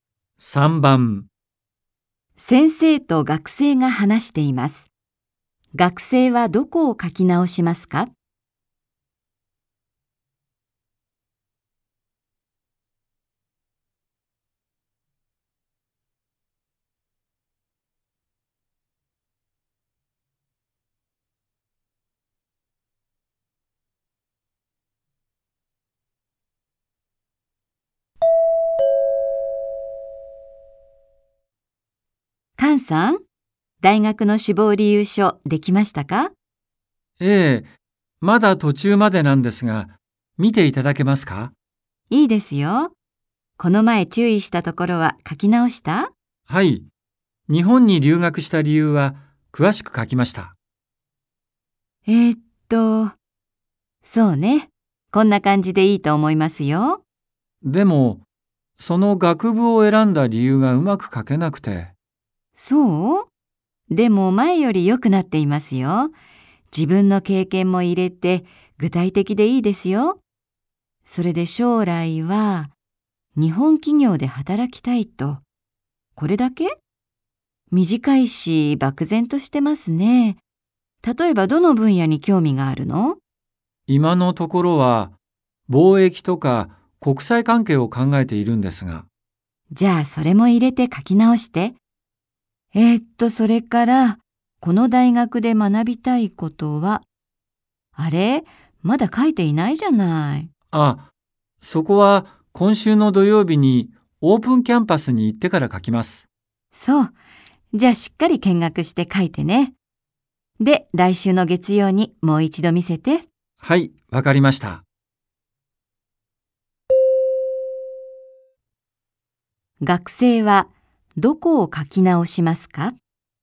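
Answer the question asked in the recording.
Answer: 将来の希望(日本企業で働きたいという部分)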